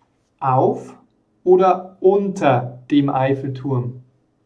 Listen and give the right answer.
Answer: auf dem Eiffelturm.